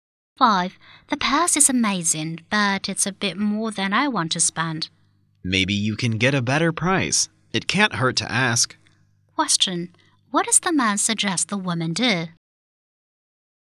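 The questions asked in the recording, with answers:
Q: What does the man suggest the woman do?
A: Ask for a lower price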